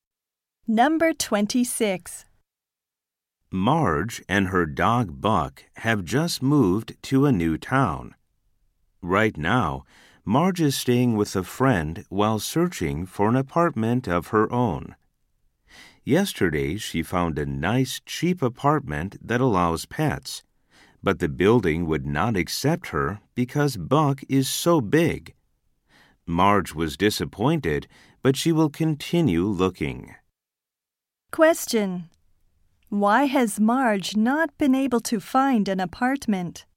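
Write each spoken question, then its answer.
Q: Why has Marge not been able to find an apartment?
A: Her dog Buck is too big.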